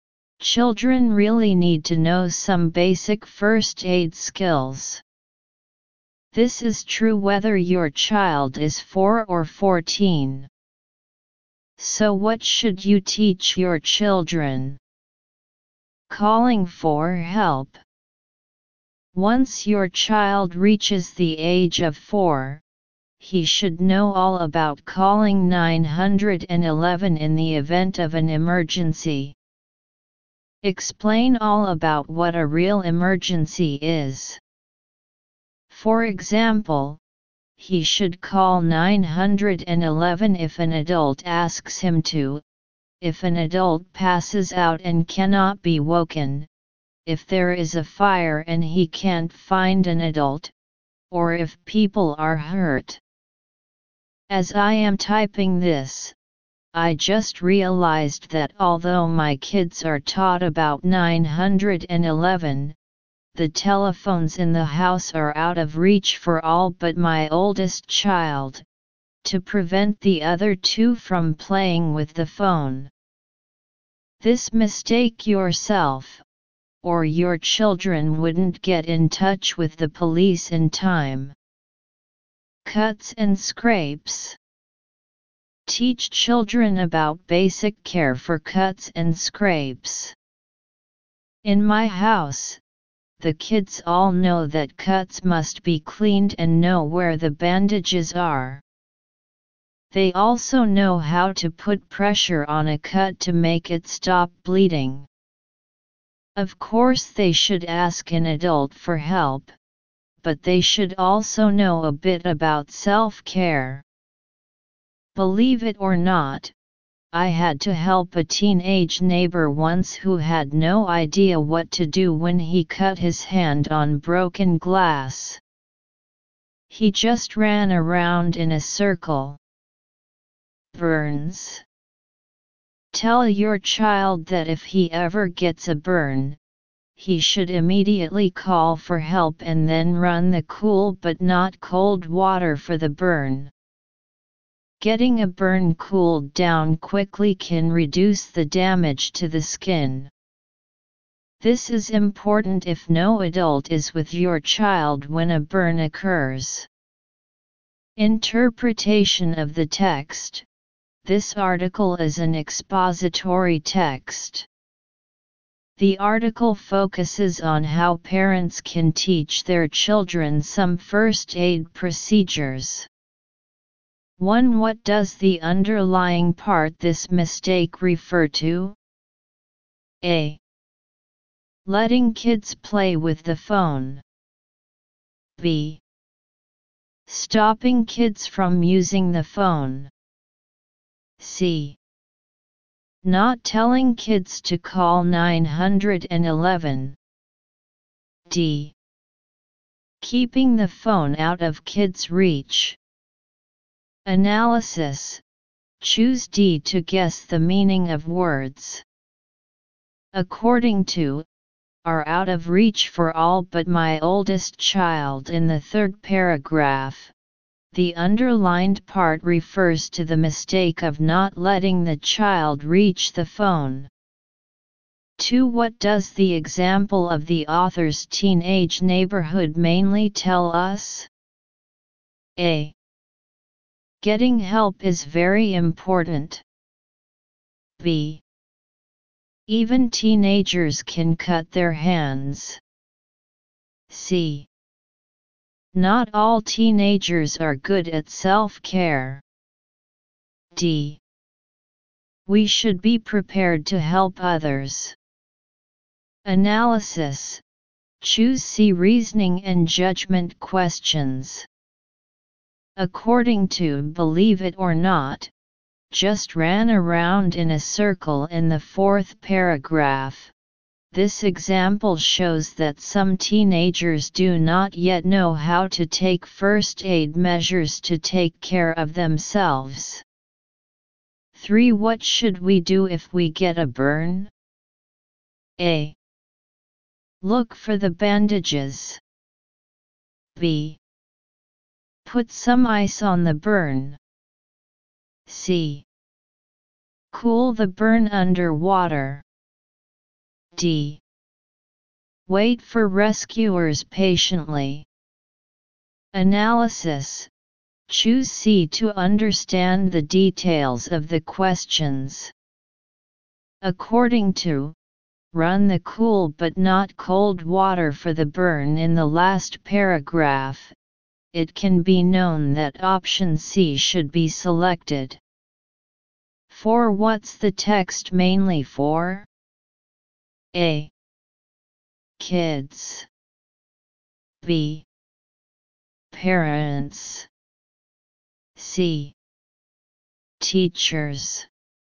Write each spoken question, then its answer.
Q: What does the underlying part this mistake refer to?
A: Choose D

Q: What does the example of the author's teenage neighborhood mainly tell us?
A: Choose C.

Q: What should we do if we get a burn?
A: Choose C

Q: what's the text mainly for?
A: Choose B.